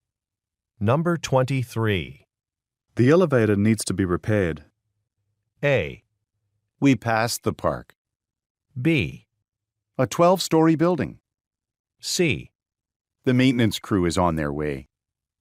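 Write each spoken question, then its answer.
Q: The elevator needs to be repaired.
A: C: The maintenance crew is on their way.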